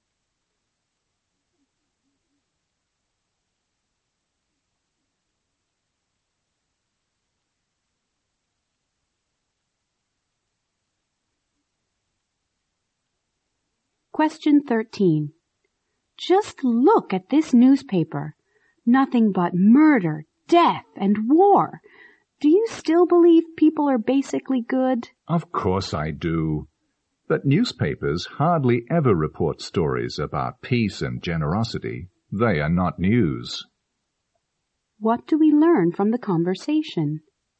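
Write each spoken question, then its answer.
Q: What do we learn from the conversation?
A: Newspapers rarely report good news like peace and generosity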